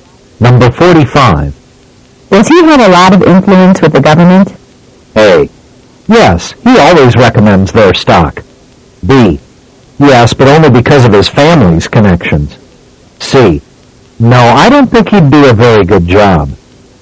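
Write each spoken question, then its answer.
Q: Does he have a lot of influence with the government?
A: B: Yes, but only because of his family's connections.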